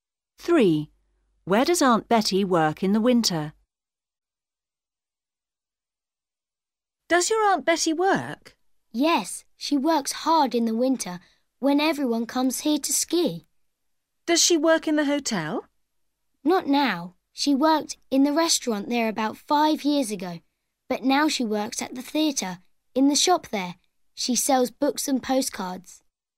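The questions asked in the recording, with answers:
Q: Where does Aunt Betty work in the winter?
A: In the shop at the theatre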